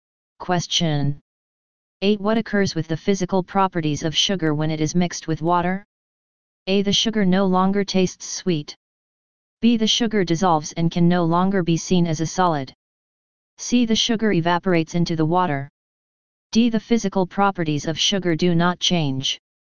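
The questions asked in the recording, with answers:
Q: What occurs with the physical properties of sugar when it is mixed with water?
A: B: The sugar dissolves and can no longer be seen as a solid.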